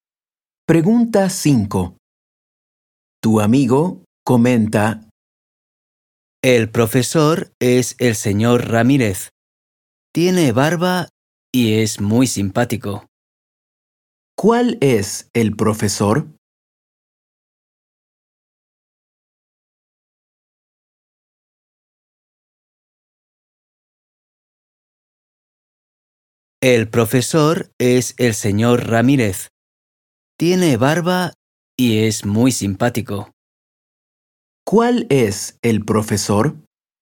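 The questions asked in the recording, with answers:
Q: ¿Cuál es el profesor?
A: El señor Ramírez, el que tiene barba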